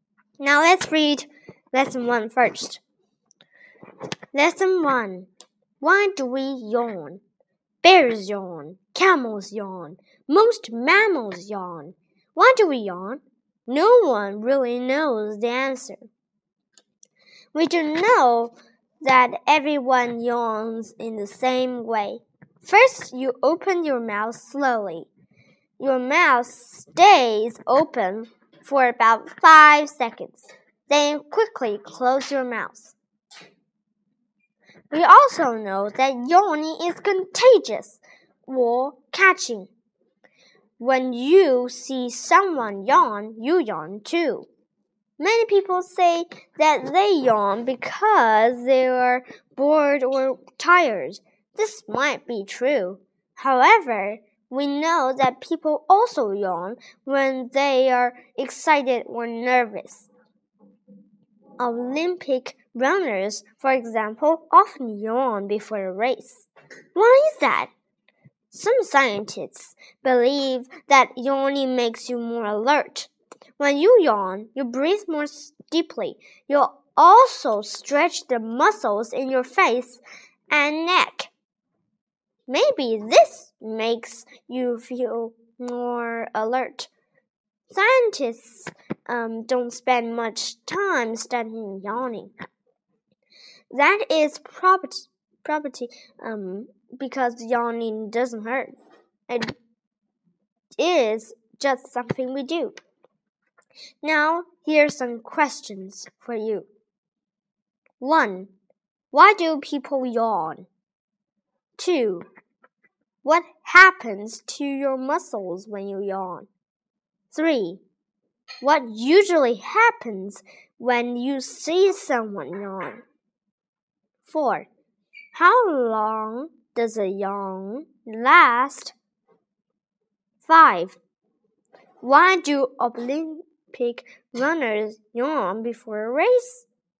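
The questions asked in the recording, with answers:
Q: What happens to your muscles when you yawn?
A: The muscles in your face and neck stretch

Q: What usually happens when you see someone yawn?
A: You yawn too

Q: How long does a yawn last?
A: About five seconds

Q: Why do Olympic runners yawn before a race?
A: They are excited or nervous; yawning may make them more alert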